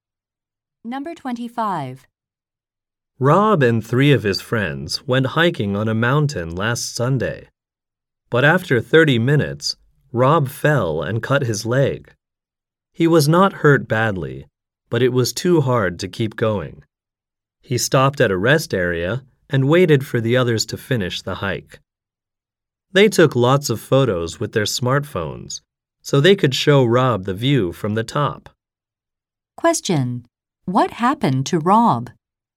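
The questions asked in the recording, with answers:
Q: What happened to Rob?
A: He fell and cut his leg, so he couldn't finish the hike.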